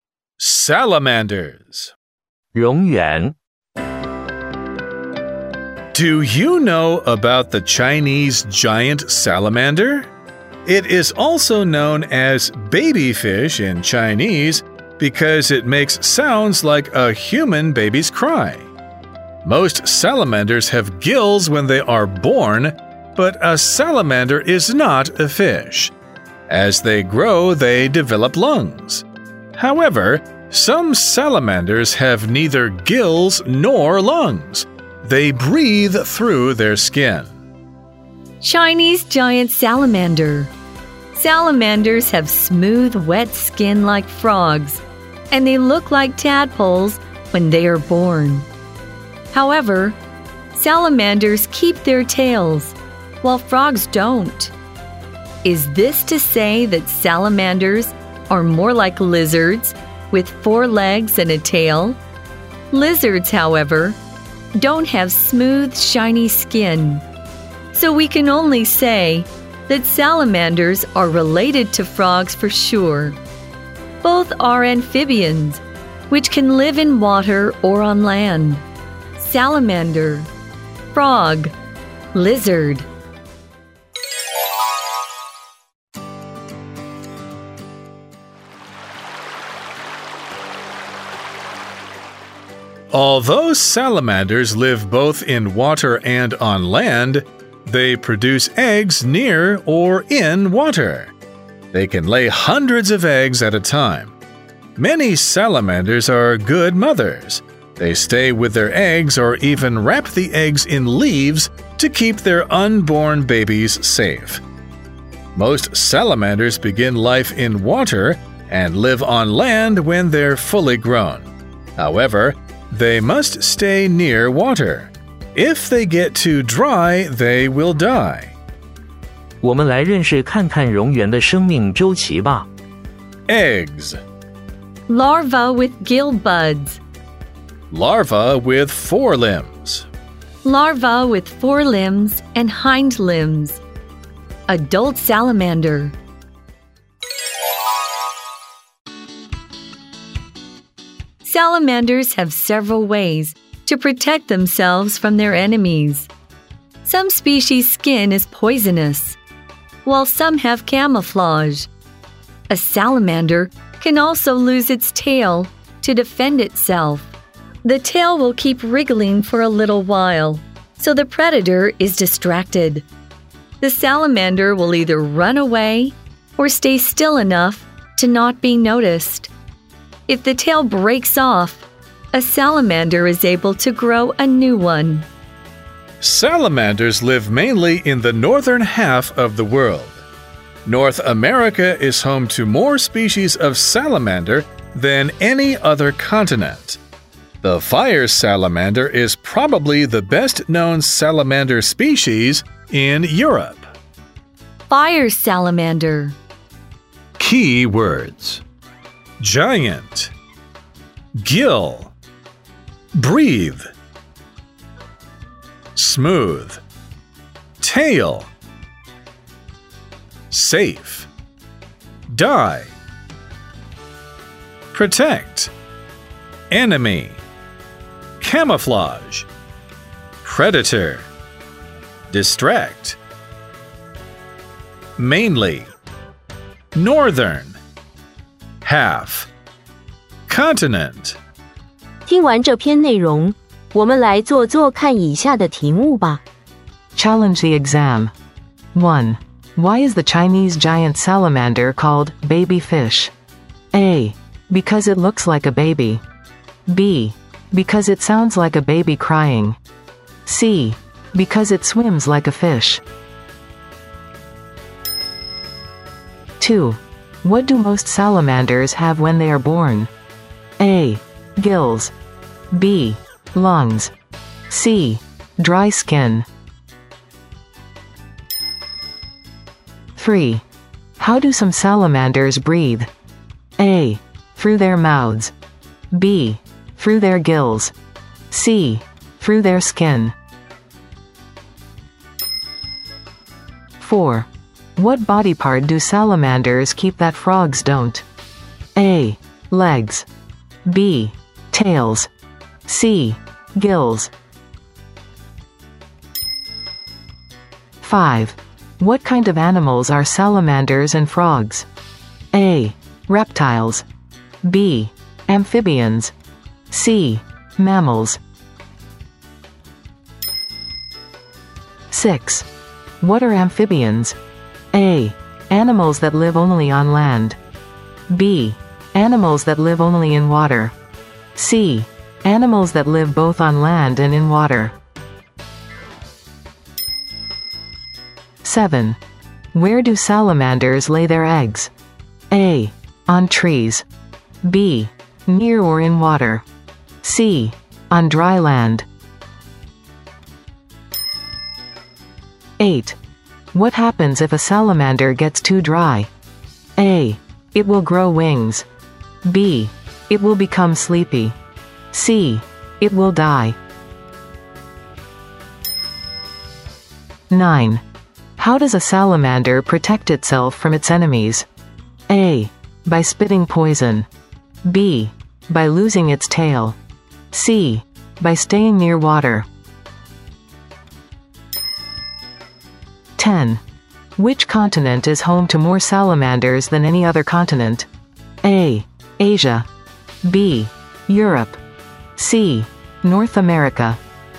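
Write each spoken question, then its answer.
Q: Why is the Chinese giant salamander called baby fish?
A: B: Because it sounds like a baby crying.

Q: What do most salamanders have when they are born?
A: A: Gills.

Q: How do some salamanders breathe?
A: C: through their skin.

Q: What body part do salamanders keep that frogs don't?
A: B: tails.

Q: What kind of animals are salamanders and frogs?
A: B: Amphibians.

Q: What are amphibians?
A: C: Animals that live both on land and in water.

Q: Where do salamanders lay their eggs?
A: B: Near or in water.

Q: What happens if a salamander gets too dry?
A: C: It will die.

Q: How does a salamander protect itself from its enemies?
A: B: By losing its tail.

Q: Which continent is home to more salamanders than any other continent?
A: C: North America.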